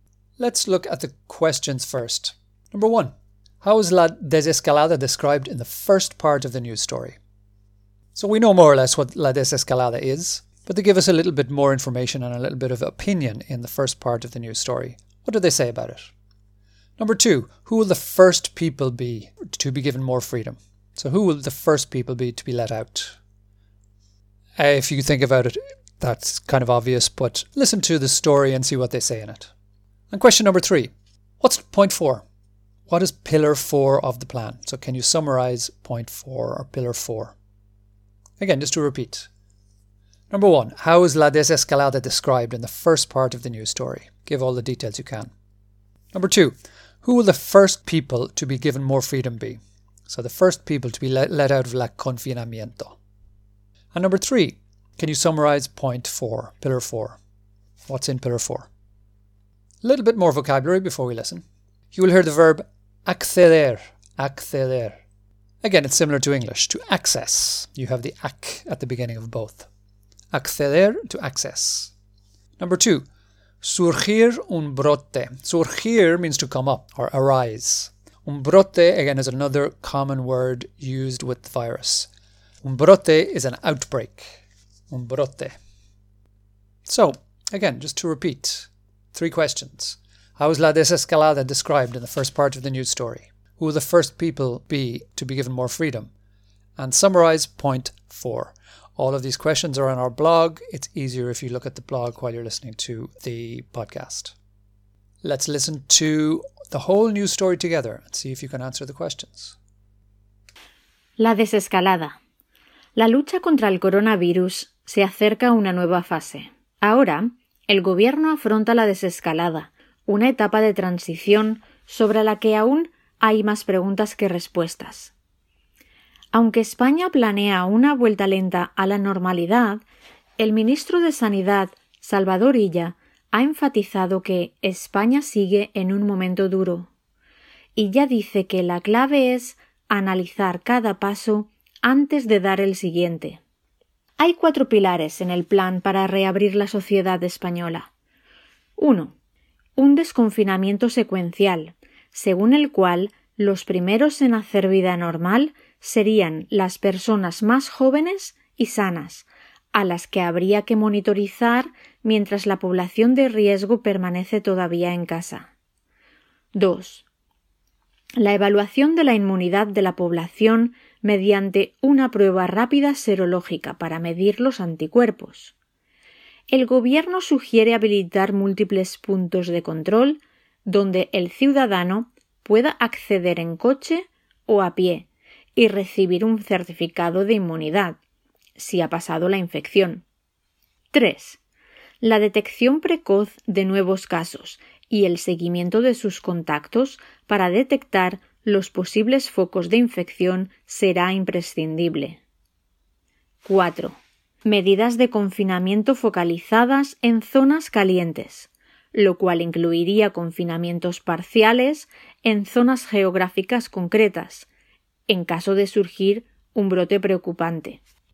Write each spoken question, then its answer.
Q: How is La Desescalada described in the first part of the news story?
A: And it is described as una etapa de transición.

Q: who will the first people be to be given more freedom?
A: Los primeros en hacer vida normal serían las personas más jóvenes y sanas.

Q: can you summarize point four, pillar four?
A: So, really, this is all about focused lockdowns in small geographical zones or areas where there is an outbreak.